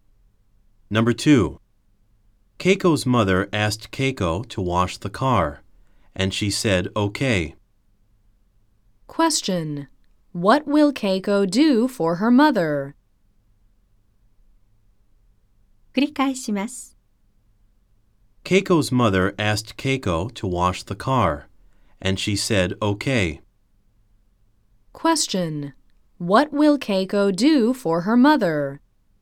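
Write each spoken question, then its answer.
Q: What will Keiko do for her mother?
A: Wash the car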